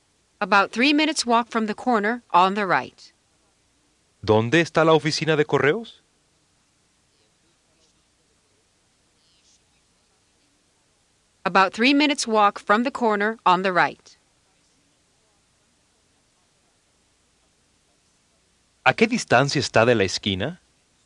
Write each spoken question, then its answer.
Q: ¿A qué distancia está de la esquina?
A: 3 minutes walk.